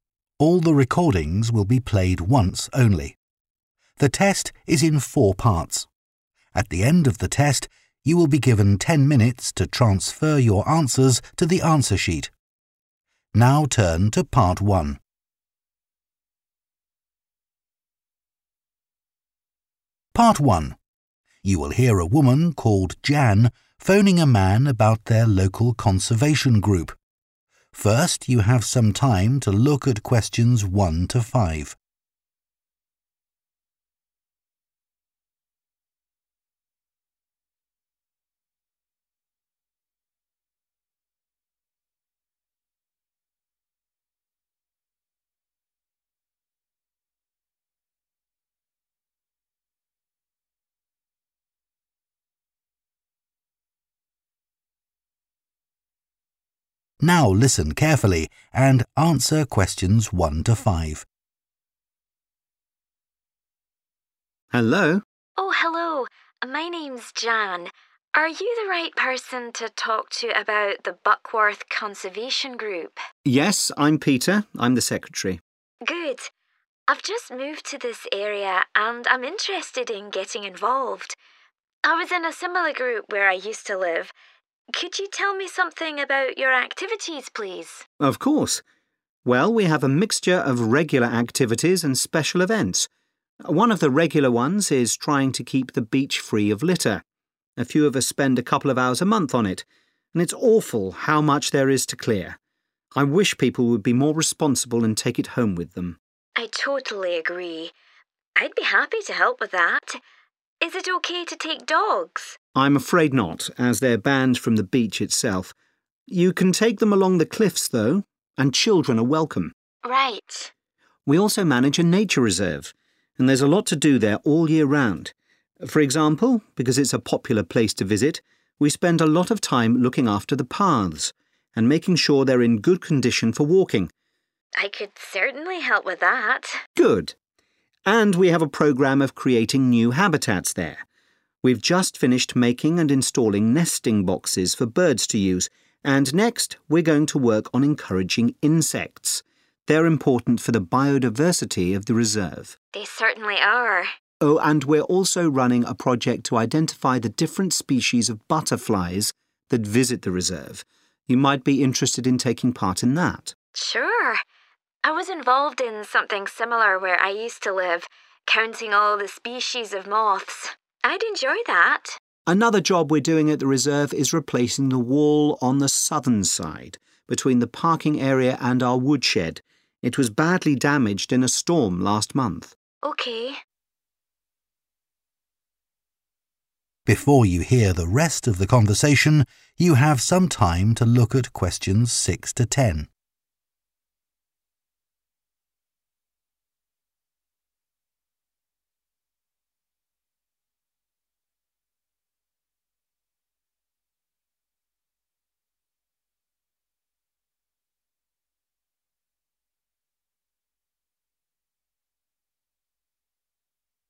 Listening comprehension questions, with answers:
Complete the notes below. Write ONE WORD AND/OR A NUMBER for each answer.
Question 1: making sure the beach does not have 1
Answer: litter

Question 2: no 2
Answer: dogs

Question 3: next task is taking action to attract 3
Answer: insects

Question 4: identifying types of 4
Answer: butterflies

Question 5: building a new 5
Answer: wall

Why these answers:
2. I'm afraid not, as they're banned from the beach itself [chúng bị cấm khỏi bãi biển].
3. next we're going to work on encouraging insects [chúng tôi sẽ bắt tay vào việc thu hút côn trùng]
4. Oh, and we're also running a project to identify the different species [=types] of butterflies [xác định những loài bướm khác nhau]
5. Another job we're doing at the reserve is replacing the [=building a new] wall on the southern side [Một công việc khác mà chúng tôi đang làm tại khu bảo tồn là thay thế bức tường ở phía nam]

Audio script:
PETER: Hello?
JAN: Oh hello. My name's Jan. Are you the right person to talk to about the Buckworth Conservation Group?
PETER: Yes, I'm Peter. I'm the secretary.
JAN: Good. I've just moved to this area, and I'm interested in getting involved. I was in a similar group where I used to live. Could you tell me something about your activities, please?
PETER: Of course. Well, we have a mixture of regular activities and special events. One of the regular ones is trying to keep the beach free of [= make sure the beach does not have] litter [giữ bãi biển không có rác thải] (Question 1). A few of us spend a couple of hours a month on it, and it's awful how much there is to clear. I wish people would be more responsible and take it home with them.
JAN: I totally agree. I'd be happy to help with that.
PETER: I'm afraid not, as they're banned from the beach itself [chúng bị cấm khỏi bãi biển]. You can take them along the cliffs, though. And children are welcome.
JAN: Right.
PETER: We also manage a nature reserve, and there's a lot to do there all year round. For example, because it's a popular place to visit, we spend a lot of time looking after [=maintaining] the paths and making sure they're in good condition for walking.
JAN: I could certainly help with that.
PETER: Good. And we have a programme of creating new habitats there. We've just finished making and installing nesting boxes for birds to use, and next we're going to work on encouraging insects [chúng tôi sẽ bắt tay vào việc thu hút côn trùng] (Question 3) – they're important for the biodiversity of the reserve.
JAN: They certainly are.
PETER: Oh, and we're also running a project to identify the different species [=types] of butterflies [xác định những loài bướm khác nhau] (Question 4) that visit the reserve. You might be interested in taking part in that.
JAN: Sure. I was involved in something similar where I used to live, counting all the species of moths. I'd enjoy that.